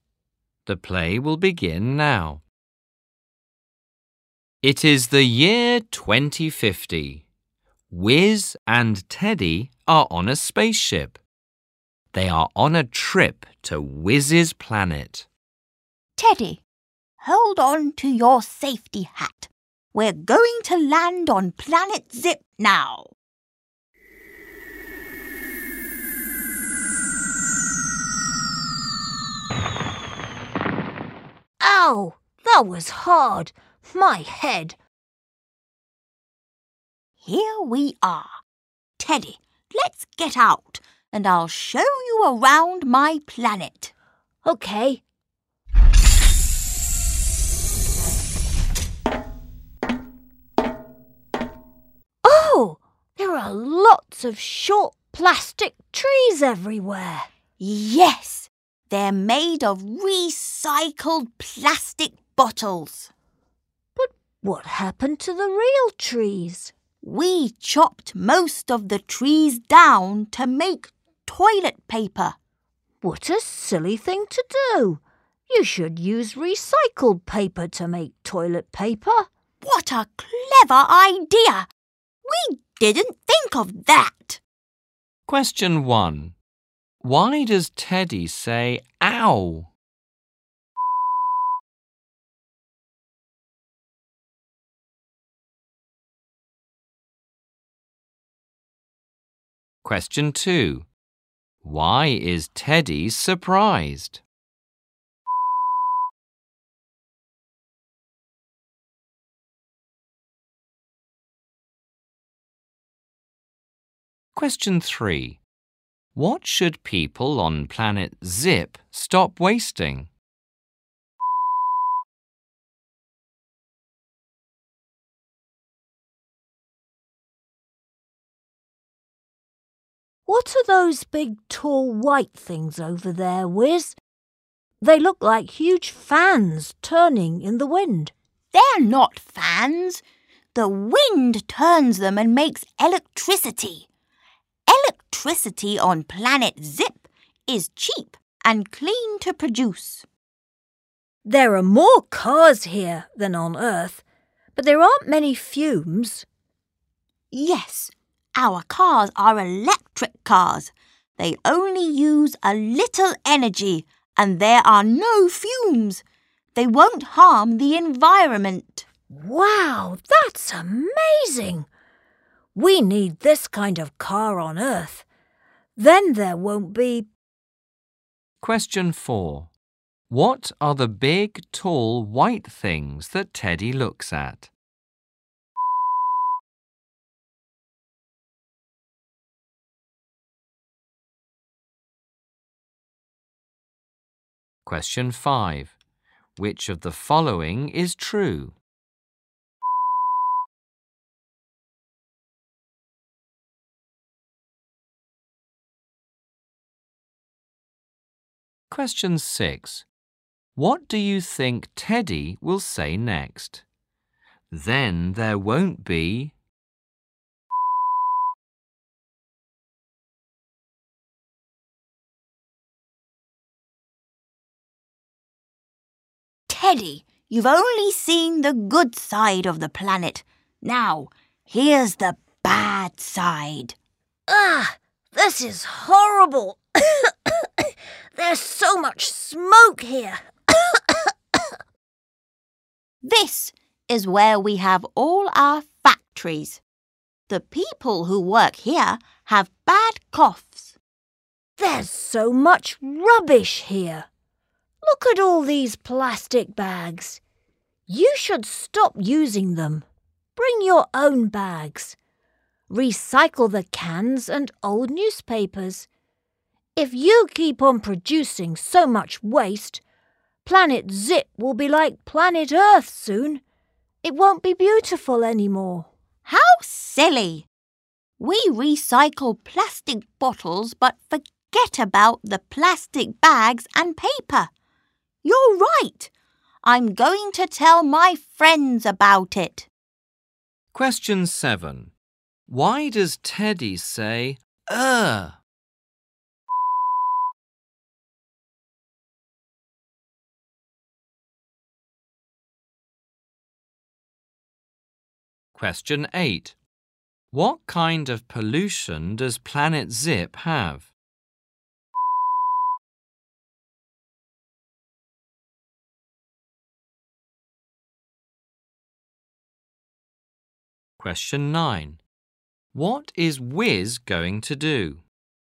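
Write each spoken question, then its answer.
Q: Why does Teddy say ow?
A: The landing was hard and he hurt his head.

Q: What are the big, tall, white things that Teddy looks at?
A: Wind turbines that make electricity from the wind.

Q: Why does Teddy say, "Ugh"?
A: There is so much smoke there.

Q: What is Wiz going to do?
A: Tell his friends about it.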